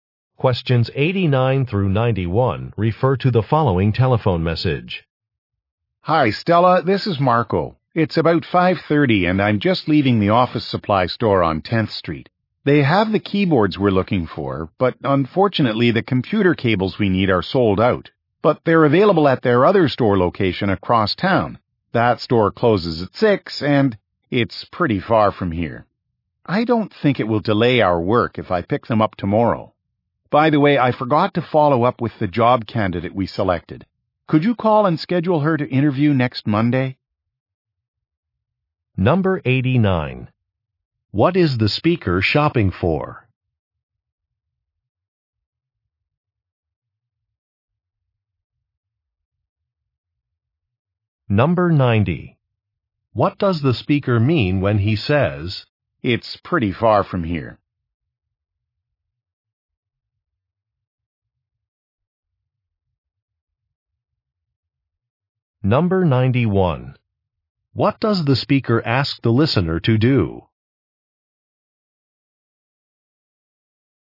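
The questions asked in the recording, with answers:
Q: What is the speaker shopping for?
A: Computer equipment (keyboards and cables)

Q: What does the speaker ask the listener to do?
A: Schedule an interview with the job candidate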